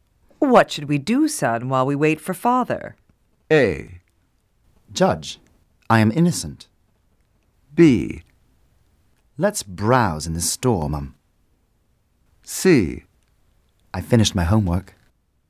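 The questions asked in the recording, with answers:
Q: What should we do, son, while we wait for father?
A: B: Let's browse in the store, Mum.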